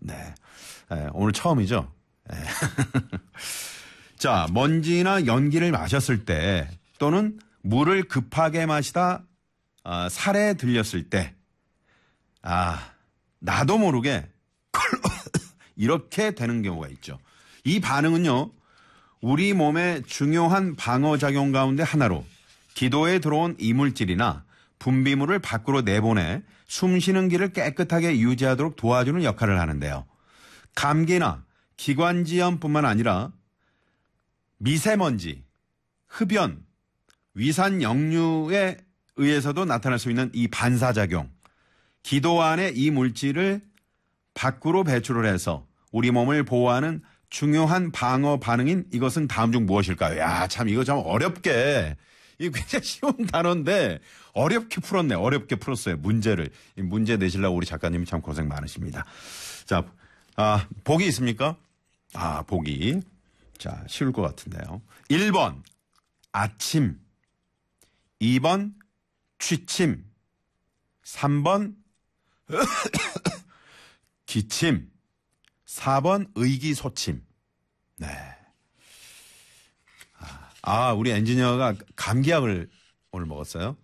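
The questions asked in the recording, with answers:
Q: 기도 안에 이 물질을 밖으로 배출을 해서 우리 몸을 보호하는 중요한 방어 반응인 이것은 다음 중 무엇일까요?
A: 3번: 기침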